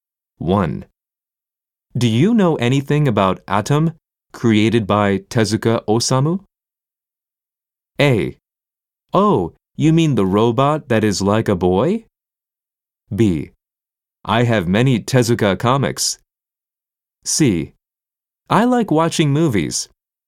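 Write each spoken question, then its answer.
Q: Do you know anything about Atom, created by Tezuka Osamu?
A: A: Oh, you mean the robot that is like a boy?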